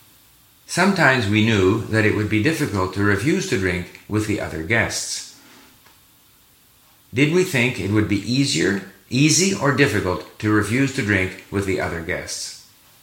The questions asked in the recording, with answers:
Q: Did we think it would be easy or difficult to refuse to drink with the other guests?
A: We knew that it would be difficult to refuse to drink with the other guests.